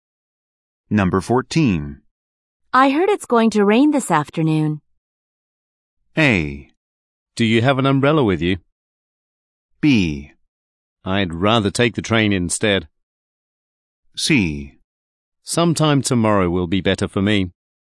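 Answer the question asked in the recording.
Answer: A: Do you have an umbrella with you?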